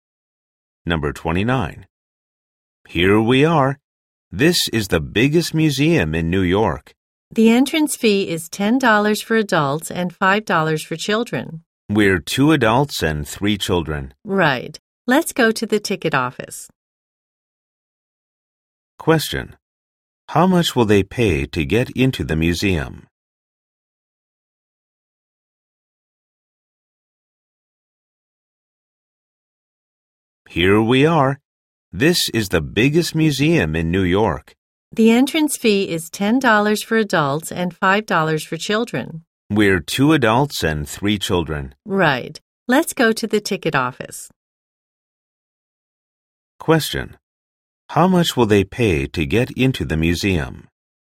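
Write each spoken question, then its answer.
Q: How much will they pay to get into the museum?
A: $35.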